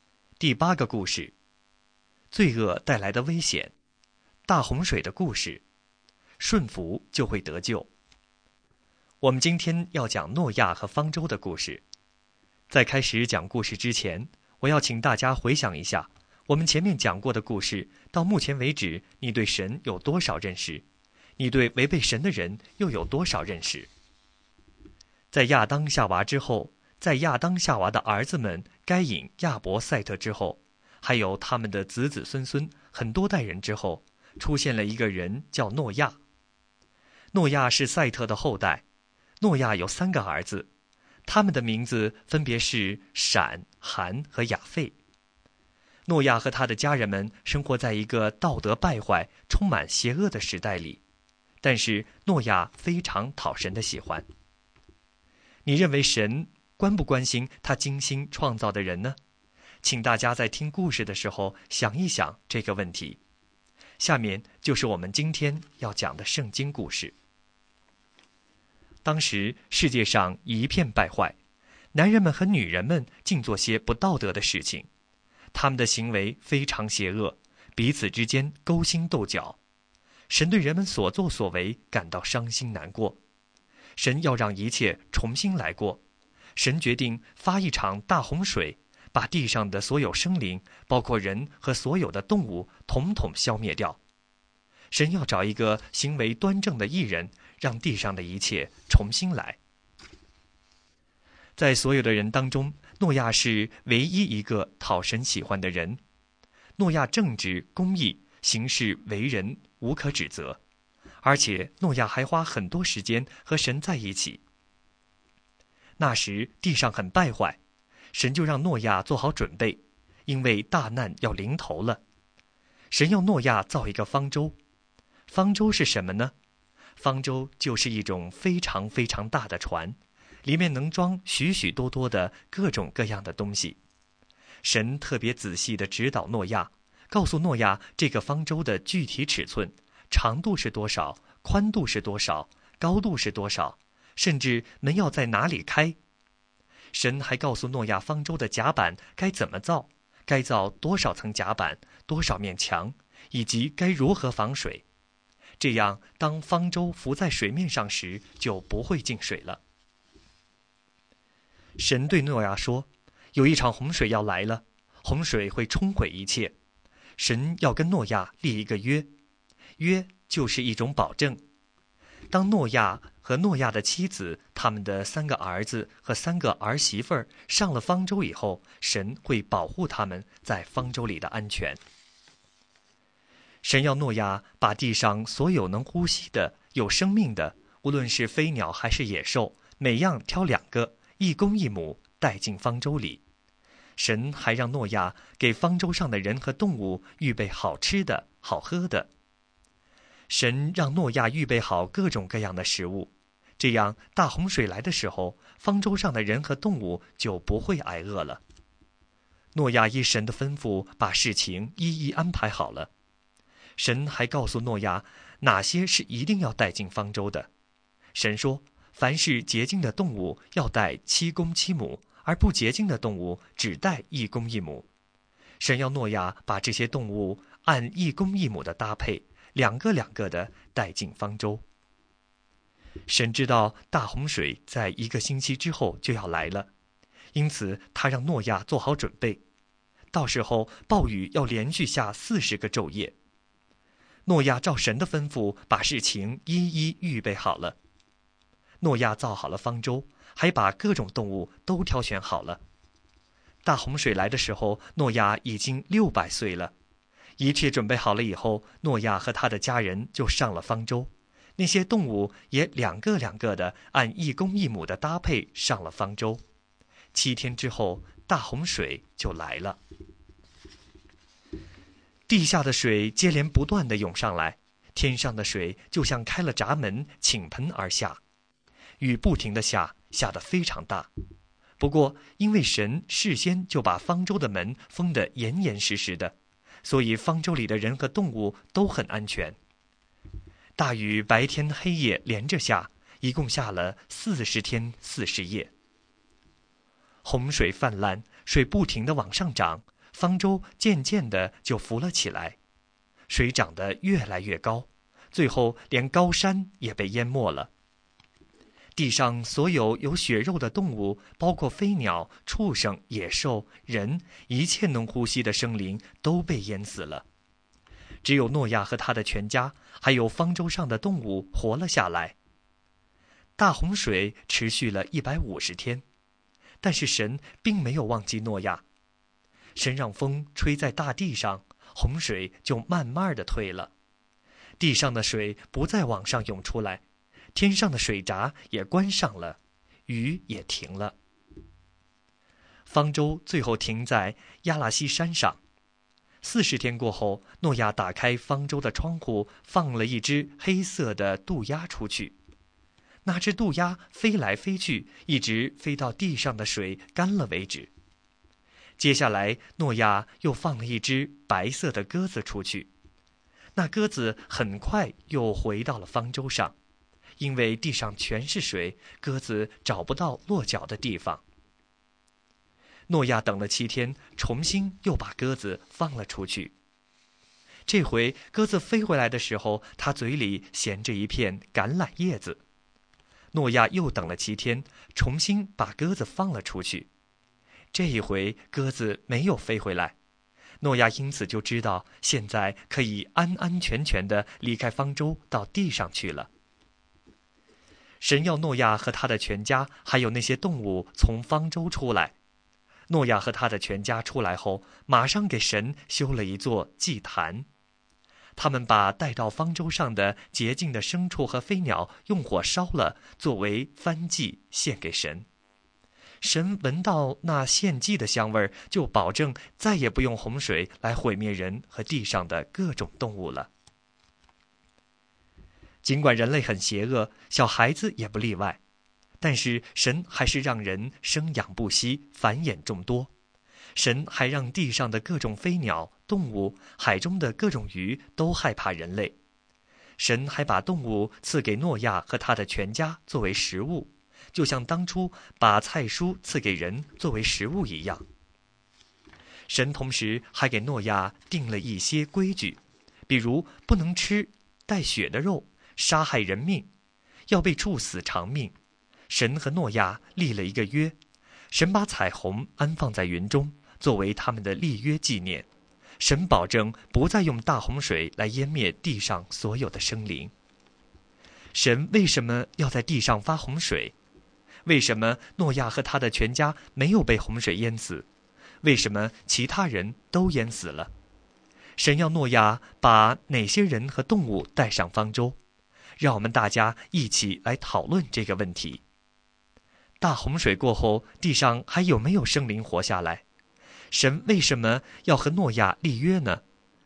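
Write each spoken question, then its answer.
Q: 神为什么要在地上发洪水?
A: 因为世界败坏,人的行为非常邪恶

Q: 为什么诺亚和他的全家没有被洪水淹死?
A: 因为诺亚正直公义、讨神喜欢,顺服神造了方舟,神保护他们

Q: 为什么其他人都淹死了?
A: 因为他们邪恶败坏

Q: 神要诺亚把哪些人和动物带上方舟?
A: 诺亚、妻子、三个儿子和儿媳妇;每样动物一公一母,洁净的七公七母

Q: 大洪水过后,地上还有没有生灵活下来?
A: 只有诺亚全家和方舟上的动物活了下来

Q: 神为什么要和诺亚立约呢?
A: 保证不再用洪水毁灭地上所有的生灵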